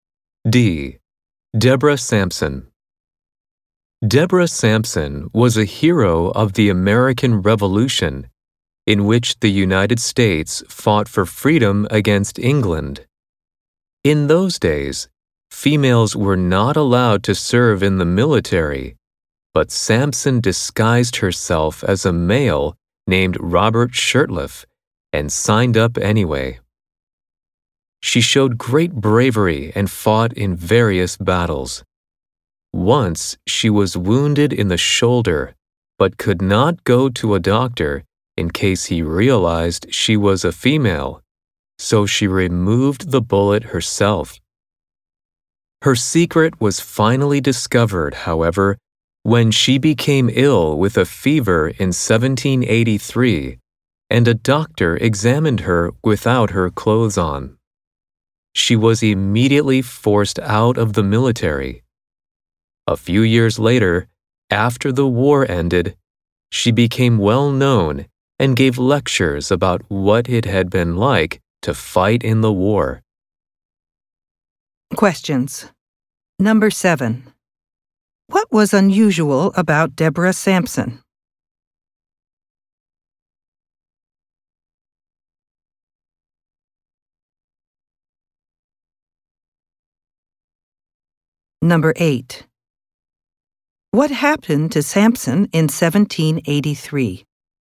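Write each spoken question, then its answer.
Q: What was unusual about Deborah Sampson?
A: She was a woman who disguised herself as a man to fight in the military.

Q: What happened to Sampson in 1783?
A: She got a fever, a doctor discovered she was a woman, and she was forced out of the military.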